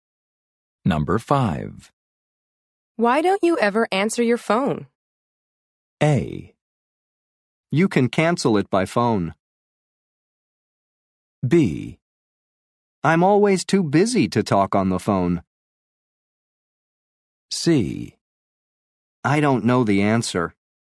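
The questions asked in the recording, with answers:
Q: Why don't you ever answer your phone?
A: B: I'm always too busy to talk on the phone.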